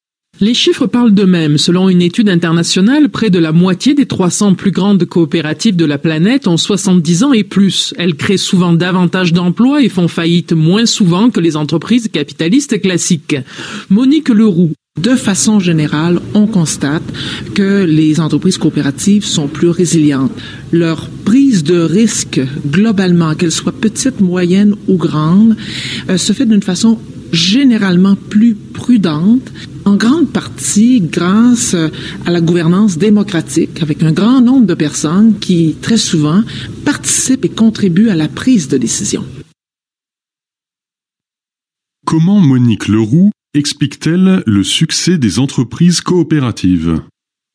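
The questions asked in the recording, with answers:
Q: Comment Monique Leroux explique-t-elle le succès des entreprises coopératives ?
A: Par leur gouvernance démocratique : beaucoup de personnes participent aux décisions, ce qui rend la prise de risque plus prudente.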